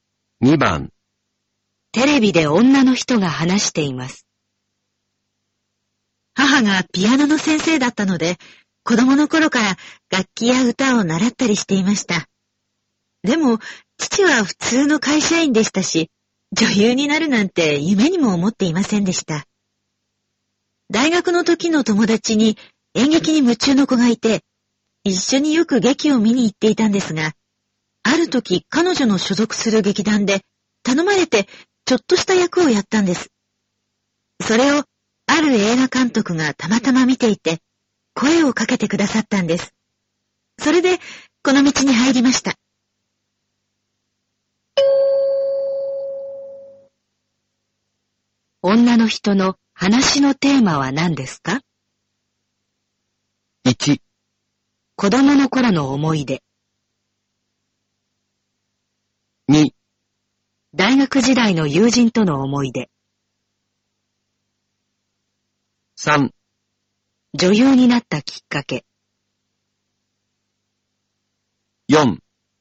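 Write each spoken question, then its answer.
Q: 女の人の話のテーマは何ですか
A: 3: 女優になったきっかけ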